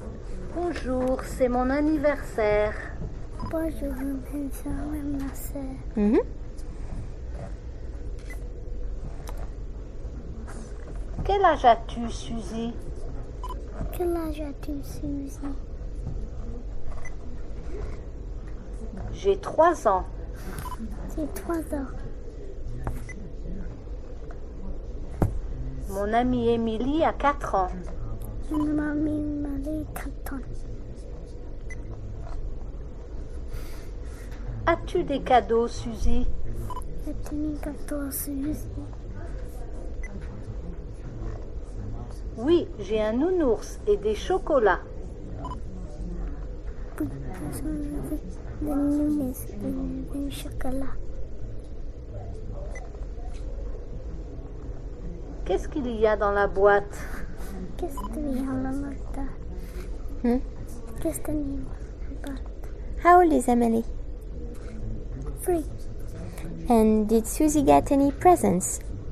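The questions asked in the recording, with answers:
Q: And did Susie get any presents?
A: Yes, a teddy bear and chocolates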